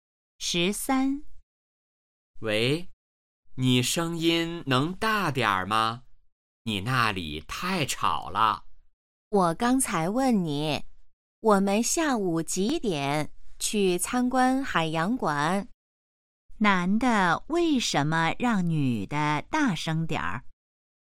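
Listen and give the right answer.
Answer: 女的那里太吵了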